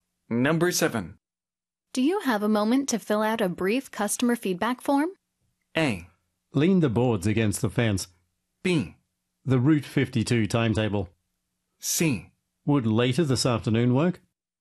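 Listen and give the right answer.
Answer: C: Would later this afternoon work?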